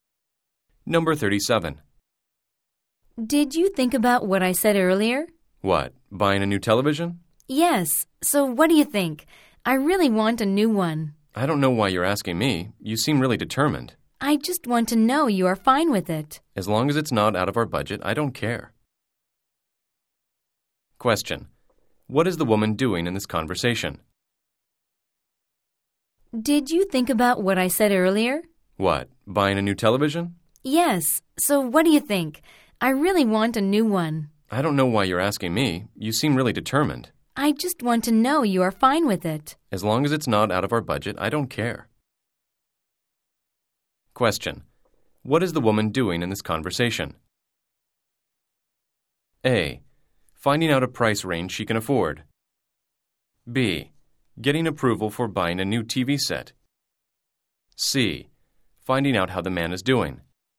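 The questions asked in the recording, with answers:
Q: What is the woman doing in this conversation?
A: B: Getting approval for buying a new TV set.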